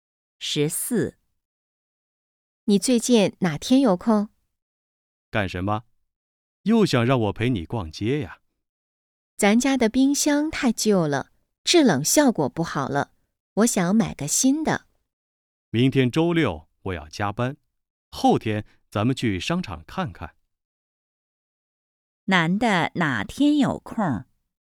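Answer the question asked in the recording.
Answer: 后天(星期天)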